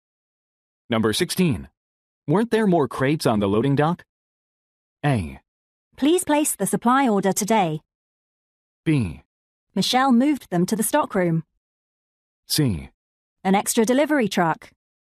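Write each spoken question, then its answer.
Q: Weren't there more crates on the loading dock?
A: B: Michelle moved them to the stockroom.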